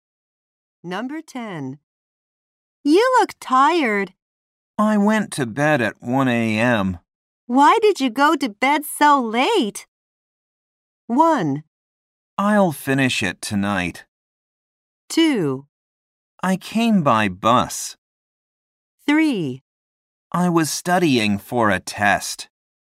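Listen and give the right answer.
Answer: 3: I was studying for a test.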